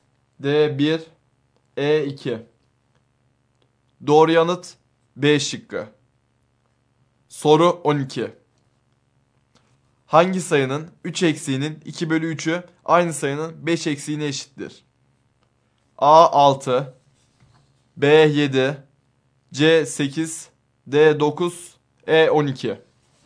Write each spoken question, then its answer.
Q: Hangi sayının 3 eksiğinin 2 bölü 3'ü aynı sayının 5 eksiğine eşittir?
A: Doğru yanıt D şıkkı.